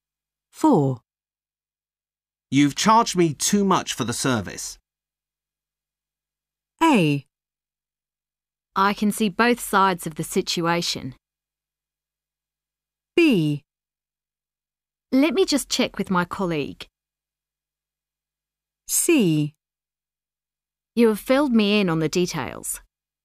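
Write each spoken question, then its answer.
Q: You've charged me too much for the service.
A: B: Let me just check with my colleague.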